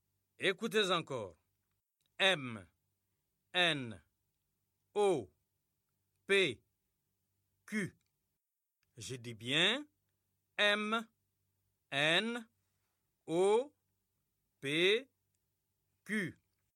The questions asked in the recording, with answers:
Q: M, N, O, P, Q. Je dis bien M, N, O, P, Q.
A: j'espère que les élèves ont écrit R.